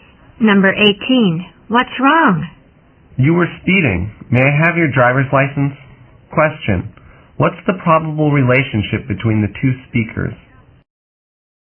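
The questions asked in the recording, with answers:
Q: What's the probable relationship between the two speakers?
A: Driver and police officer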